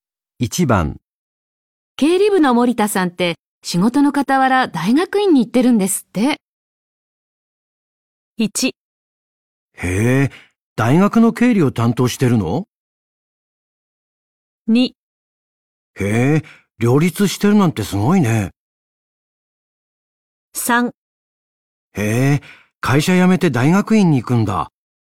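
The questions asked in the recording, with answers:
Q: 部の森田さんって仕事の傍ら大学院に行ってるんですって。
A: 2: へえ、両立してるなんてすごいね。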